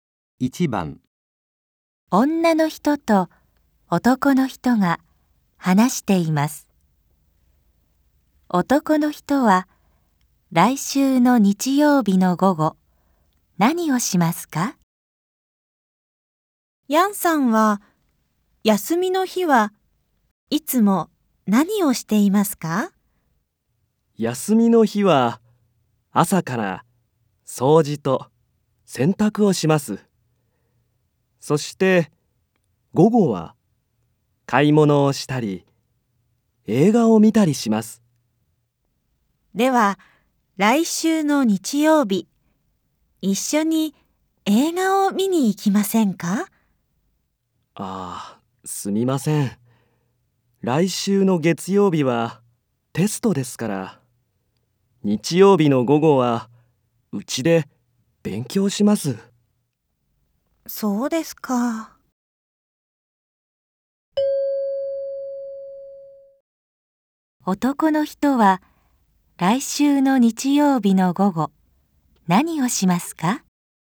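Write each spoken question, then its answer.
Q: 男の人は、来週の日曜日の午後、何をしますか?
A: うちで勉強します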